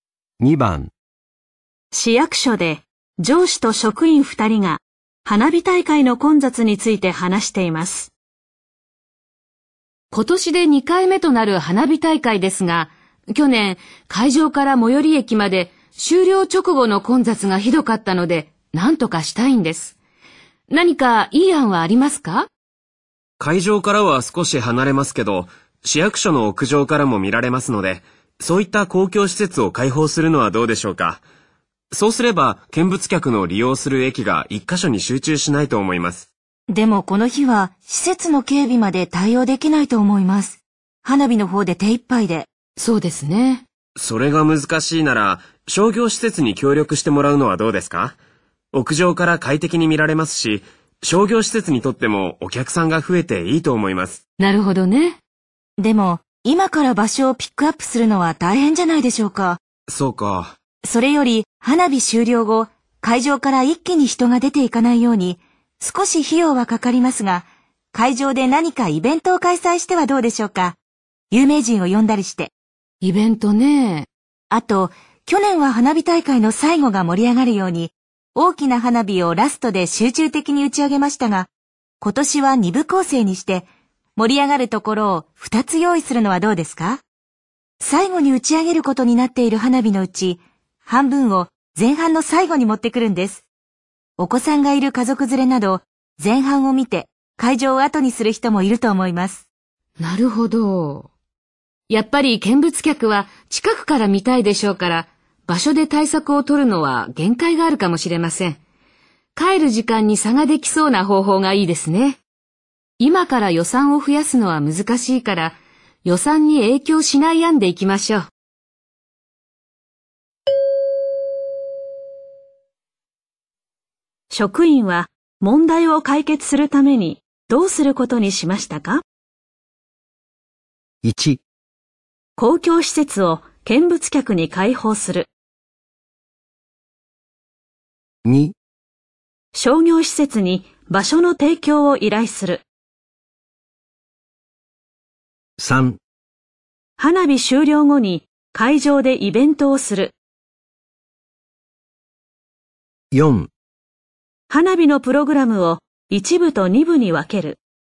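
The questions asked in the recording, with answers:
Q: 職員は問題を解決するためにどうすることにしましたか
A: 4: 花火のプログラムを一部と二部に分ける。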